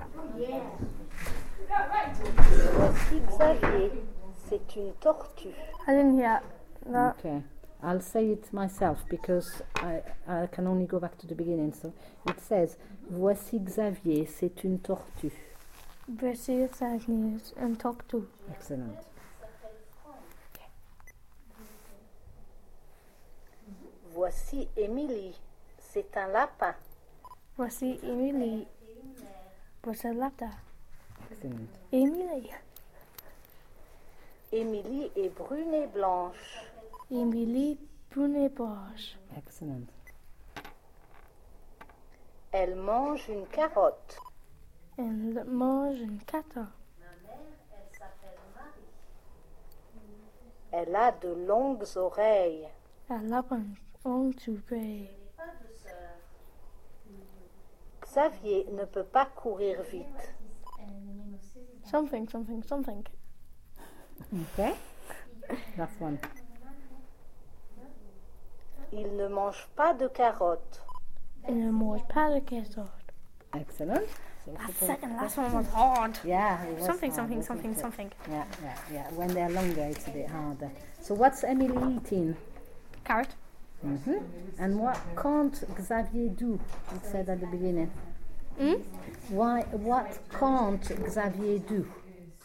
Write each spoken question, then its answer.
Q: What can't Xavier do?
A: Run.